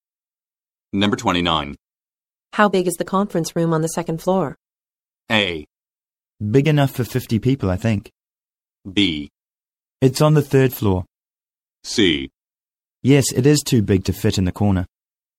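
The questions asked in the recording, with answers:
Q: How big is the conference room on the second floor?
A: A: Big enough for 50 people, I think.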